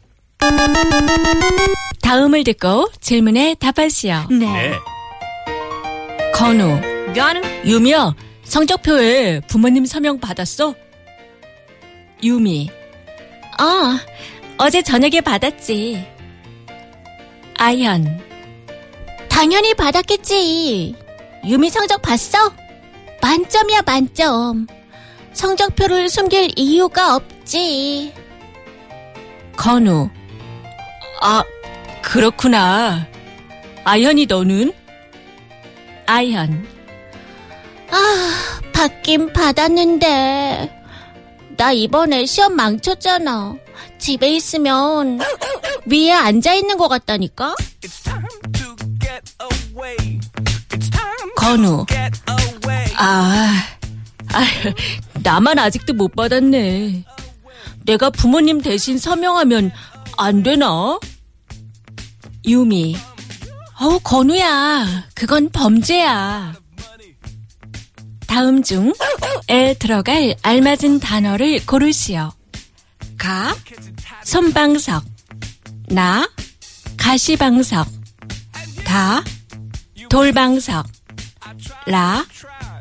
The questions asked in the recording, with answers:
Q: 다음 중에 들어갈 알맞은 단어를 고르시오.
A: 가시방석.